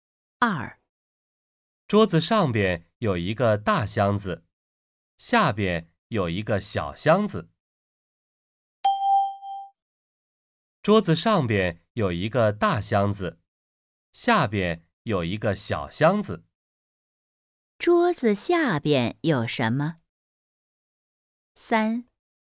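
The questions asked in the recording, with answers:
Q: 桌子下边有什么?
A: 一个小箱子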